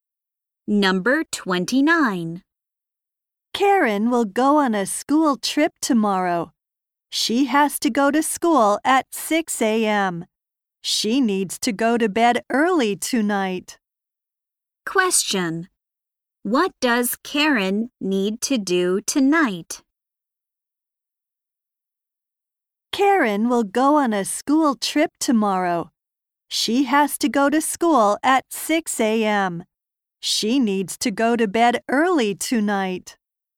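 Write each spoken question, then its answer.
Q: What does Karen need to do tonight?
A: Go to bed early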